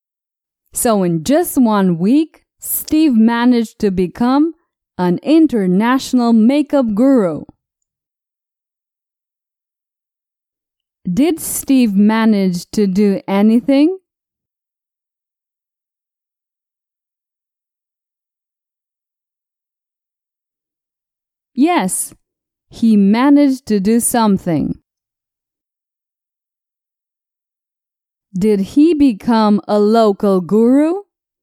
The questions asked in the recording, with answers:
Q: Did he become a local guru?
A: No, Steve became an international guru.